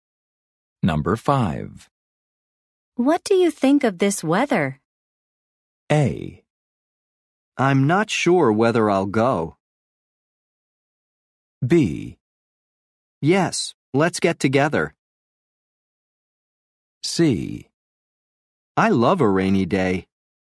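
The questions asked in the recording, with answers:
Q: What do you think of this weather?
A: C: I love a rainy day.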